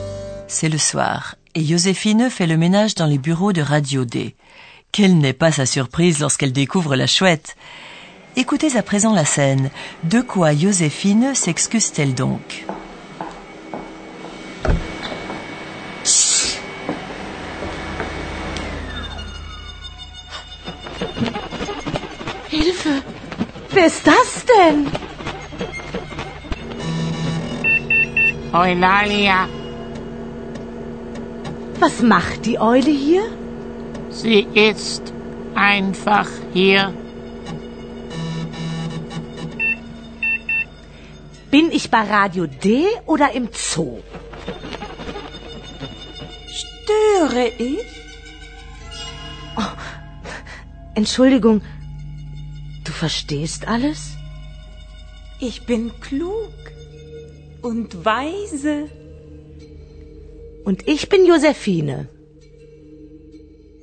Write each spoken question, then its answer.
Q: De quoi Joséphine s'excuse-t-elle donc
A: Lorsqu'elle se rend compte qu'Eulalia ne se contente pas de parler, mais qu'elle comprend également tout, Josephine s'excuse.